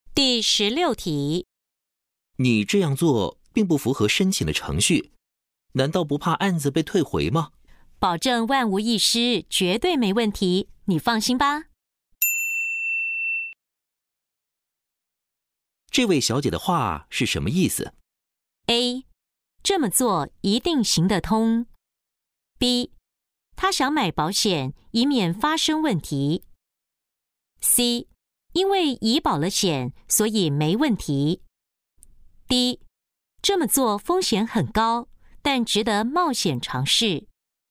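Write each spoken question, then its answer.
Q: 这位小姐的话是什么意思?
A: A: 这么做一定行得通。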